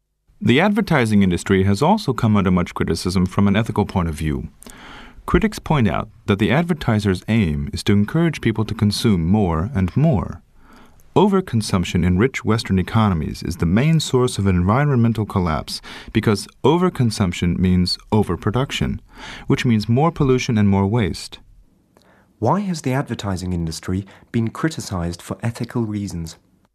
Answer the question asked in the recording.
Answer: Because the aim of the advertising industry is to encourage people to consume more and more.